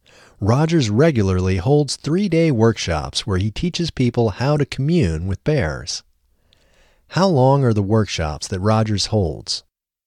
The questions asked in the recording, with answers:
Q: How long are the workshops that Rogers holds?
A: The workshops that Rogers holds are 3 days.